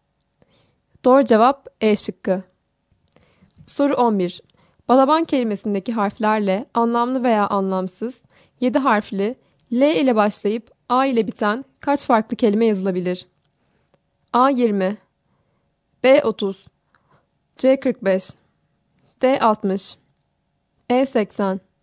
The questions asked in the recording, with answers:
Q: Balaban kelimesindeki harflerle anlamlı veya anlamsız 7 harfli L ile başlayıp A ile biten kaç farklı kelime yazılabilir?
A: Doğru cevap B şıkkı.